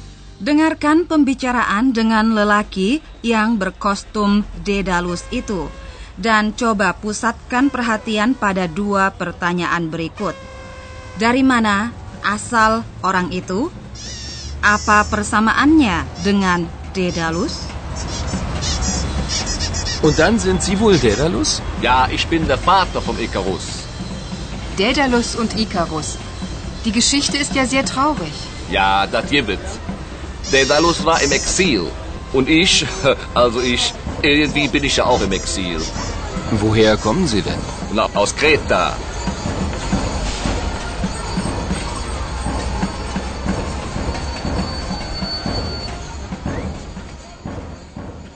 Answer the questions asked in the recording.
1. Kreta Dari pulau di Yunani itulah asal orang itu, katanya, dan Dedalus pun hidup di Kreta.
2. Nasib itulah yang terasa menjadi ikatan batin antara lelaki itu dan tokoh Daedalus.